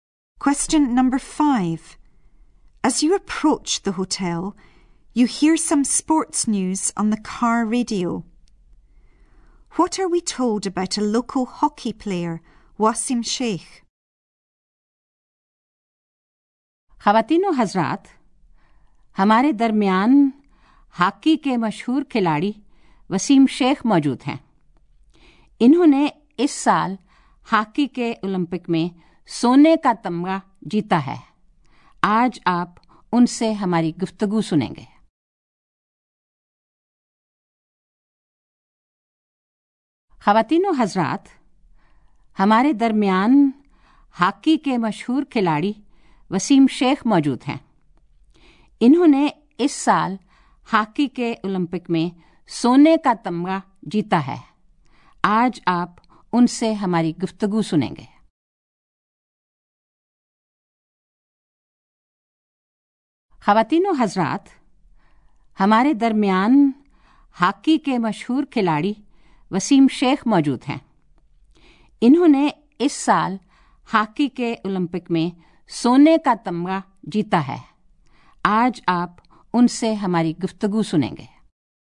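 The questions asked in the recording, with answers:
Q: What are we told about a local hockey player, Wasim Sheikh?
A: He is famous, won an Olympic gold medal this year and will be interviewed today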